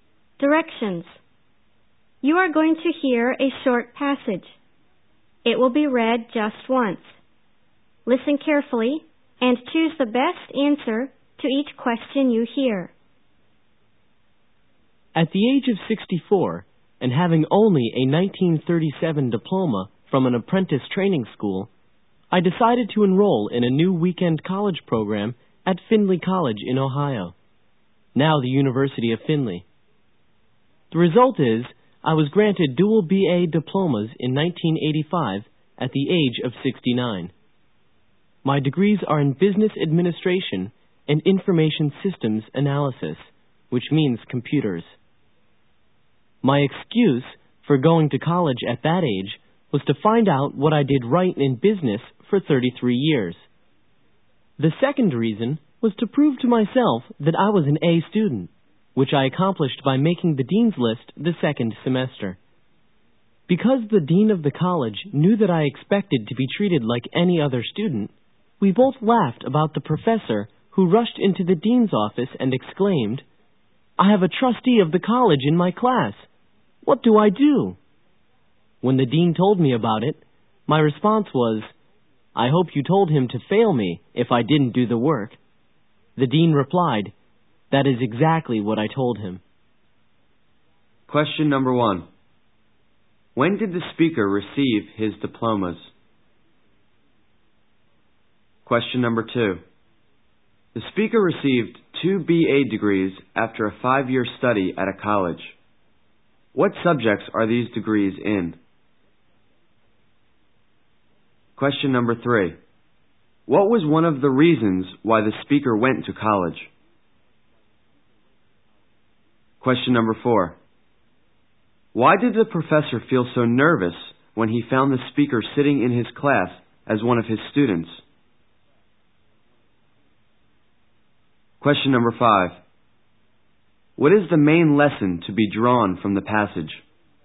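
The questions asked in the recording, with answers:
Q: When did the speaker receive his diplomas?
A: In 1985, at the age of 69

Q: What subjects are these degrees in?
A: Business administration and information systems analysis

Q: What was one of the reasons why the speaker went to college?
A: To find out what he did right in business for 33 years

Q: Why did the professor feel so nervous when he found the speaker sitting in his class as one of his students?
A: The speaker was a trustee of the college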